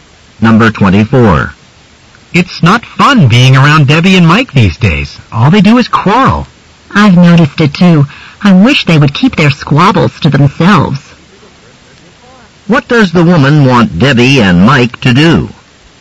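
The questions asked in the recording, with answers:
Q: What does the woman want Debbie and Mike to do?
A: Quarrel only in private.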